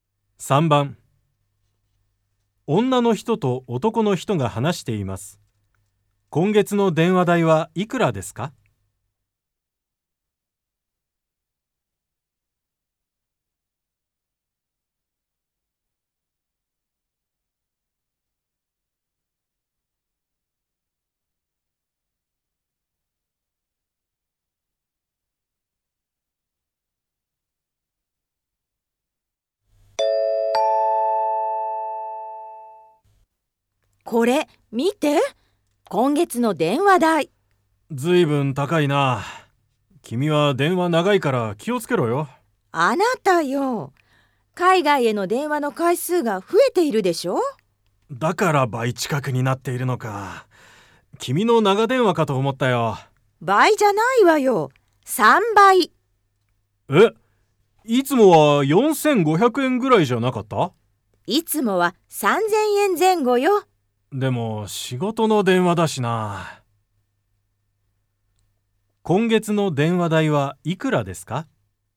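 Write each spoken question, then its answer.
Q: 今月の電話代はいくらですか?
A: 9000円ぐらい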